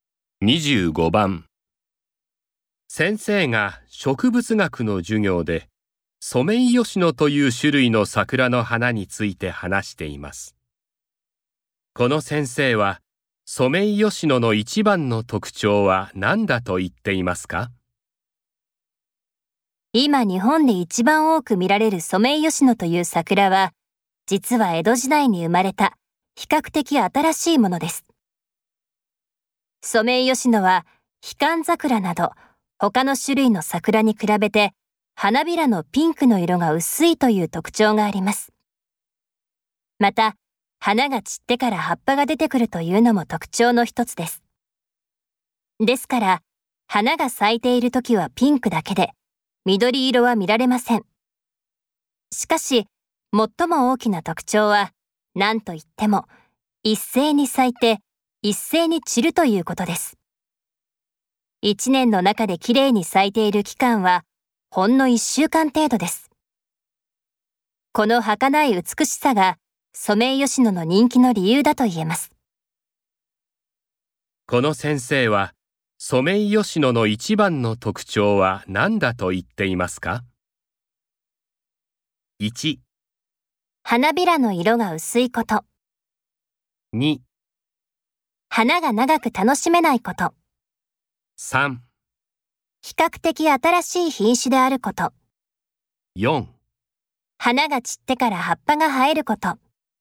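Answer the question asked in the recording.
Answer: 2: 花が長く楽しめないこと。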